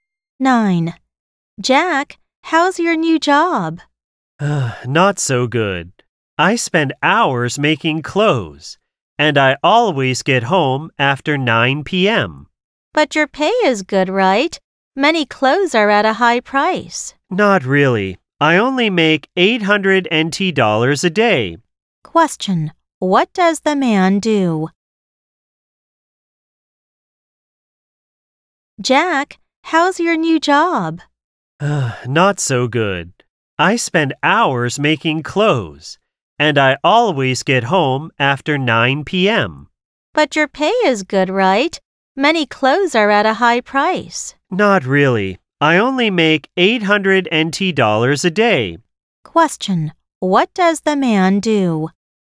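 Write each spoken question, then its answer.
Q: what does the man do?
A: He makes clothes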